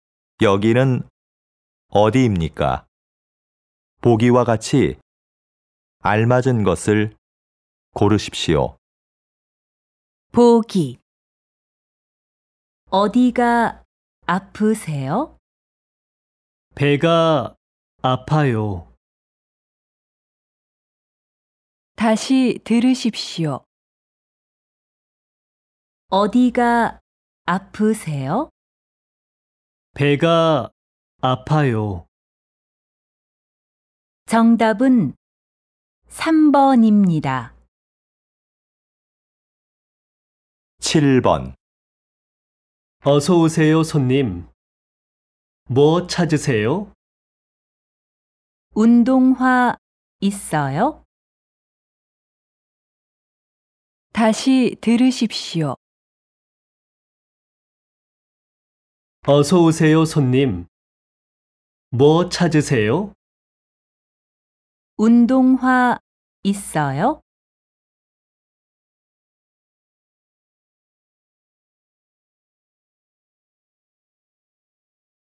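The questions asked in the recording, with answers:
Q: 여기는 어디입니까?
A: 신발 가게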